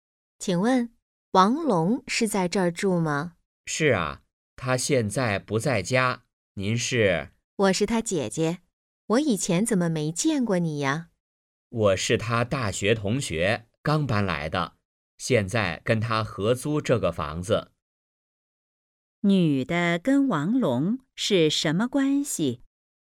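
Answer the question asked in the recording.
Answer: 姐弟(女的是王龙的姐姐)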